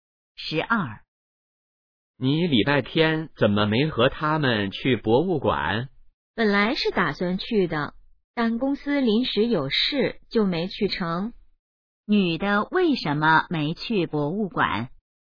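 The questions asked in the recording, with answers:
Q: 女的为什么没去博物馆?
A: 公司临时有事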